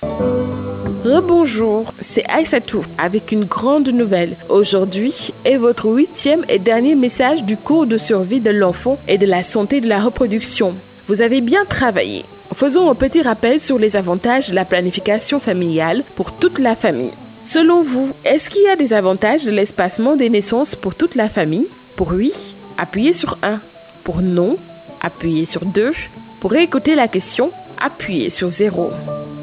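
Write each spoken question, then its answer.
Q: Selon vous, est-ce qu'il y a des avantages de l'espacement des naissances pour toute la famille?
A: 1: Oui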